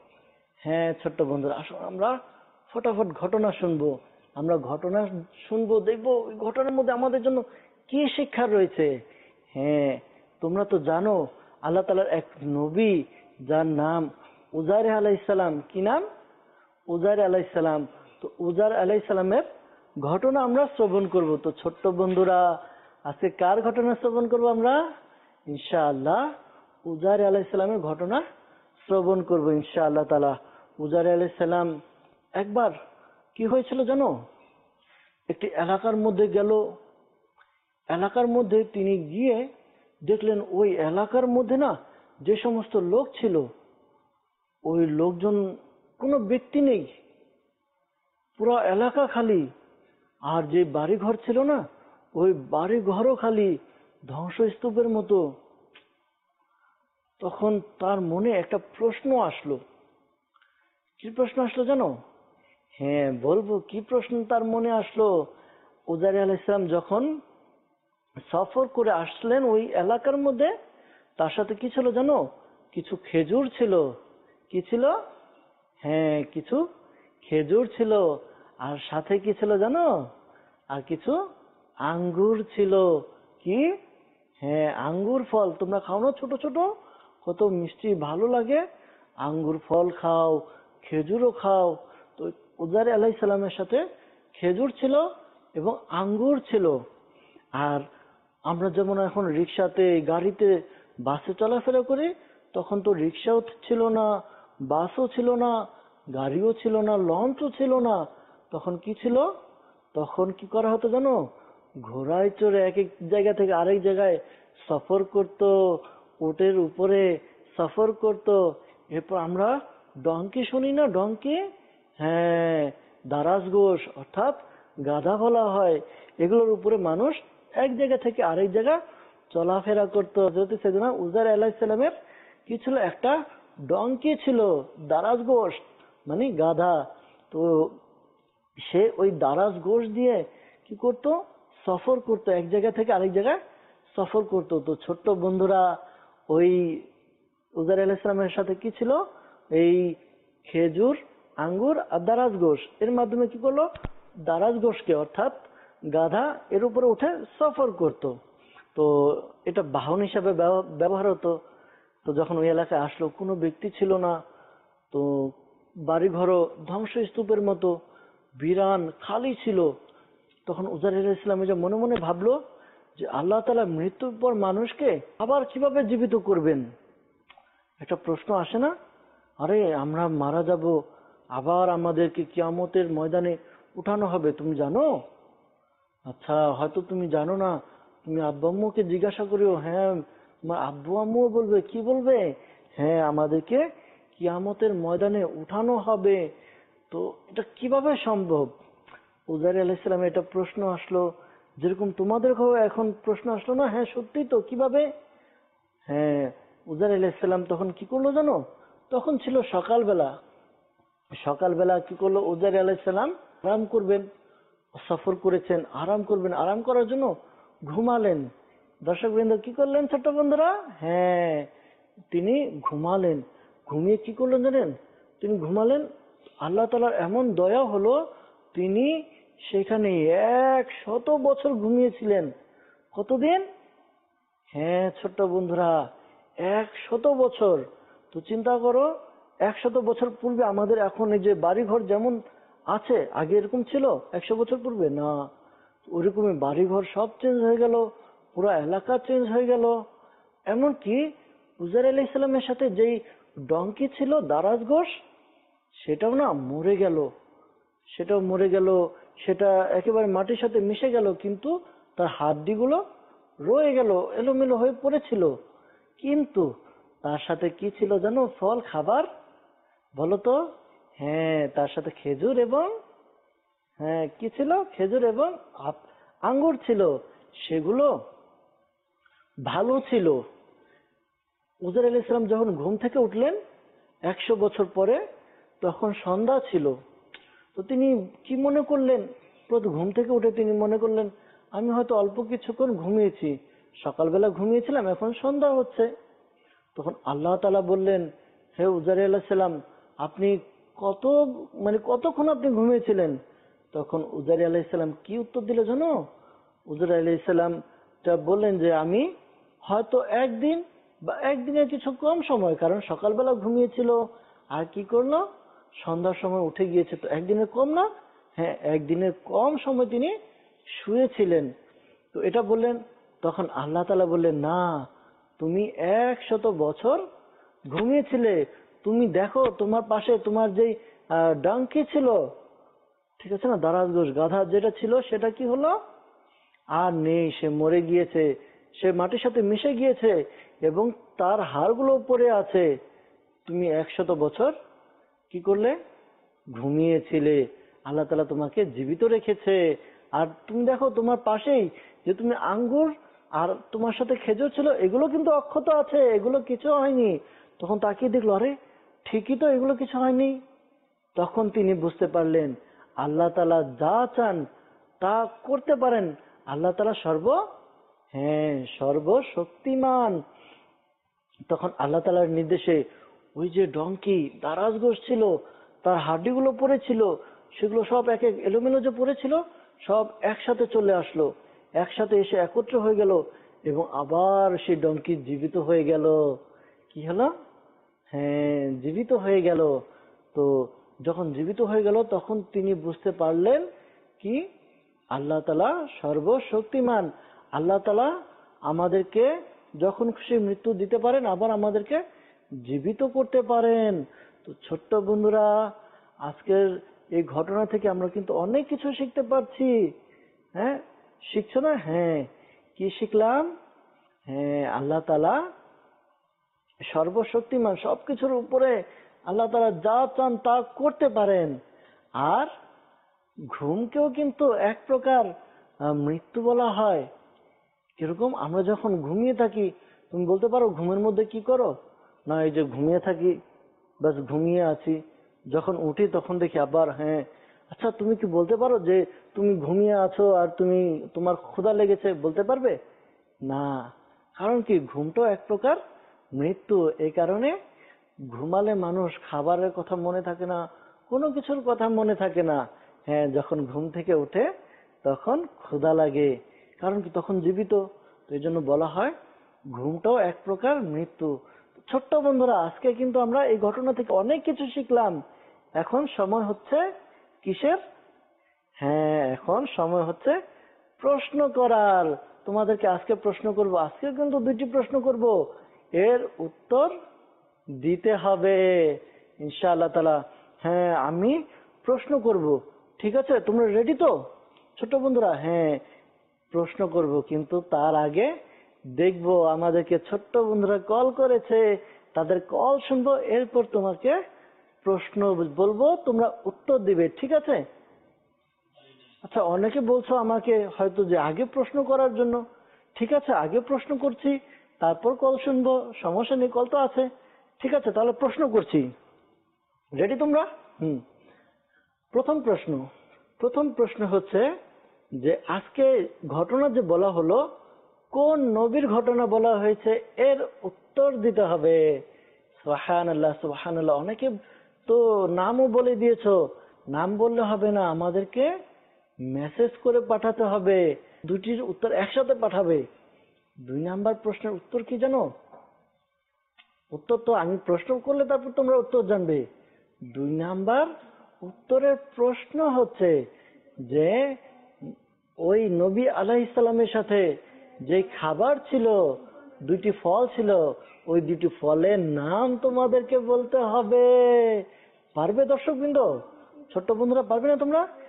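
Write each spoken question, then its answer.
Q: প্রথম প্রশ্ন হচ্ছে যে আজকে ঘটনা যে বলা হলো, কোন নবীর ঘটনা বলা হয়েছে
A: উজাইর আলাইহিসসালাম

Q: 2 নম্বর উত্তরের প্রশ্ন হচ্ছে যে ওই নবী আলাইহিসসালামের সাথে যে খাবার ছিল, 2টি ফল ছিল, ওই 2টি ফলের নাম তোমাদেরকে বলতে হবে।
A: খেজুর ও আঙ্গুর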